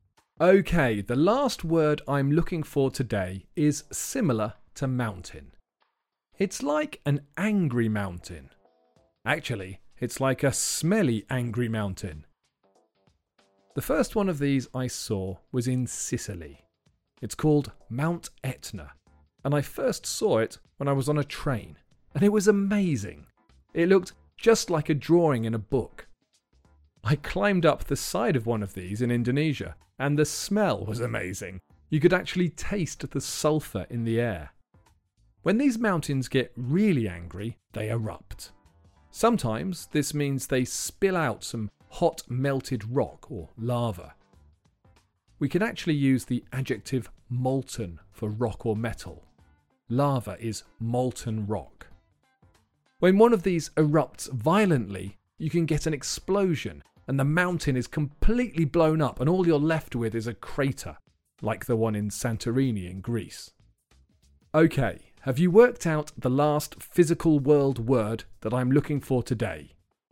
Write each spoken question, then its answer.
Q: Have you worked out the last physical world word that I'm looking for today?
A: The answer is volcano.